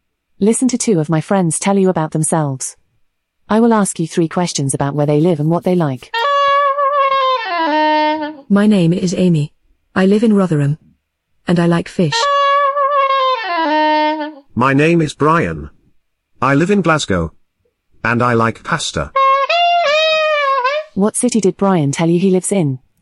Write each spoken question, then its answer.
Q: What city did Brian tell you he lives in?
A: Glasgow.